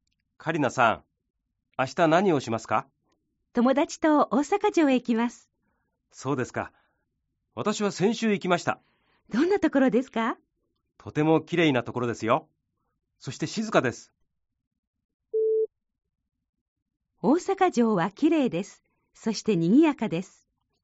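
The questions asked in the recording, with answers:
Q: 大阪城はきれいです。そしてにぎやかです。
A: ×(きれいで静かです)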